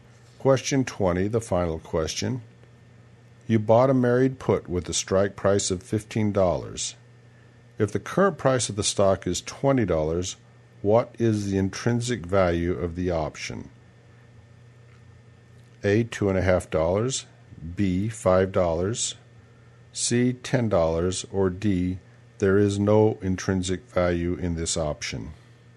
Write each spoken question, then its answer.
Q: If the current price of the stock is $20, what is the intrinsic value of the option?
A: And the answer is D. There is no intrinsic value in this option.